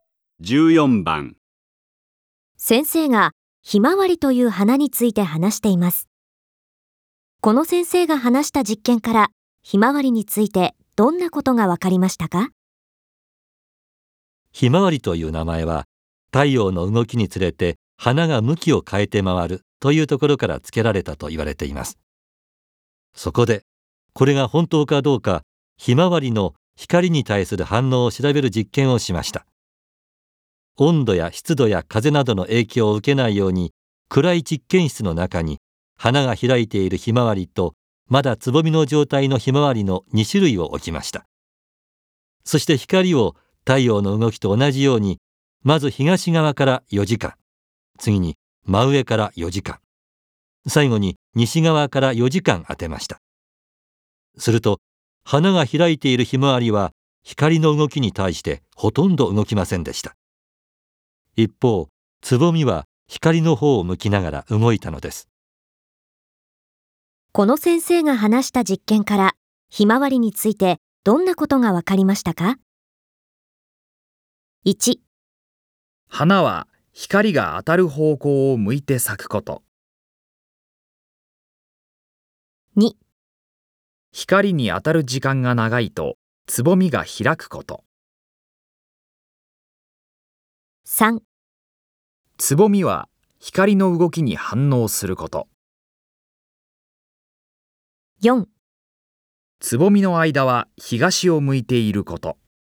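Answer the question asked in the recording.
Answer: 3: つぼみは光の動きに反応すること。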